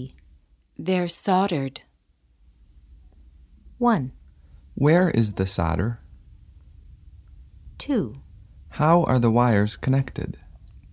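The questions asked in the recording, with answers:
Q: How are the wires connected?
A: They're soldered.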